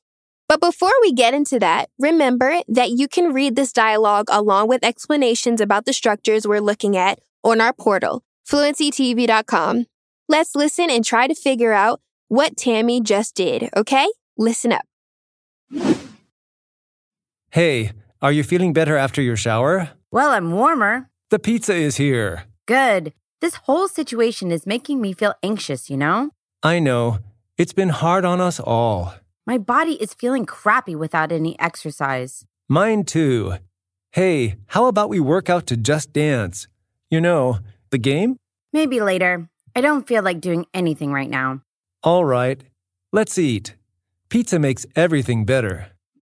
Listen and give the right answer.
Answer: Okay, so she just took a shower.